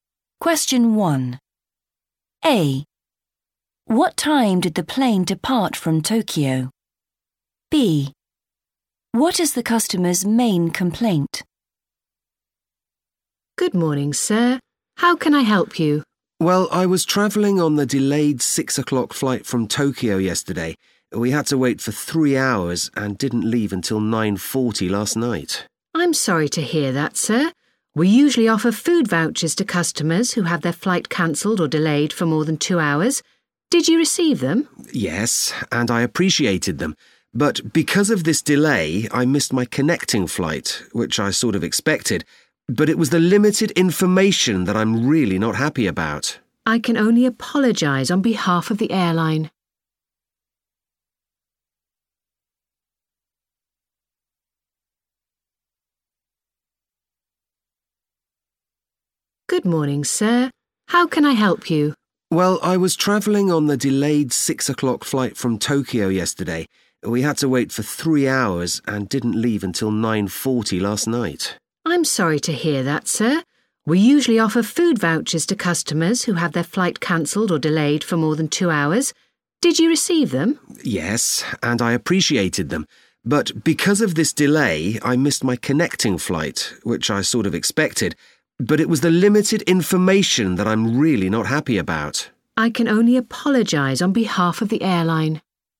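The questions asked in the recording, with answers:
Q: What time did the plane depart from Tokyo?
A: 9:40 (last night)

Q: What is the customer's main complaint?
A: limited information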